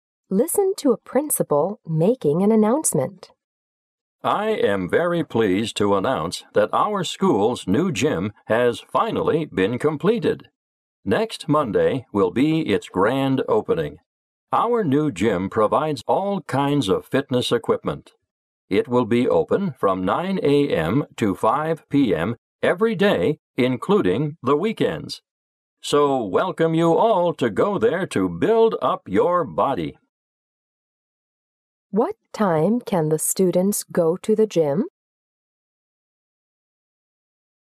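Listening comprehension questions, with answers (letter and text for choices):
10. What time can the students go to the gym?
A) 9:30 a.m. this Friday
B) 5:30 p.m. next Friday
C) 4:00 p.m. next Saturday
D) 8:30 a.m. next Saturday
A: C) 4:00 p.m. next Saturday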